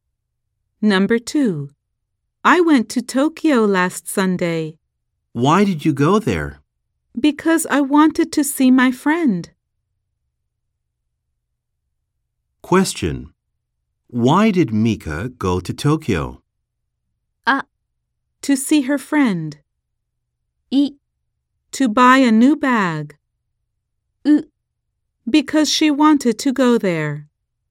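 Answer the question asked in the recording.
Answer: あ: To see her friend.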